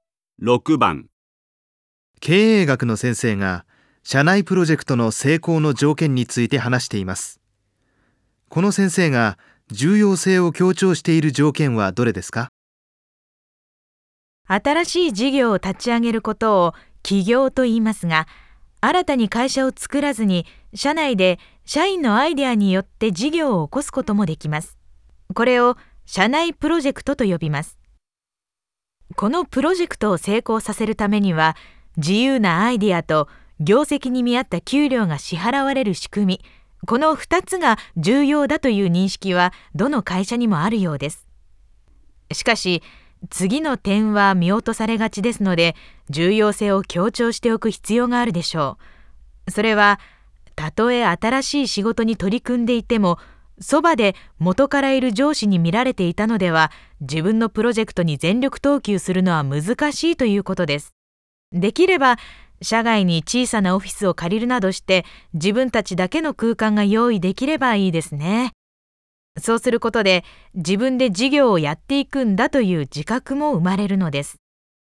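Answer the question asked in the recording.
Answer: 元の上司から離れた自分たちだけの空間(社外のオフィスなど)を用意すること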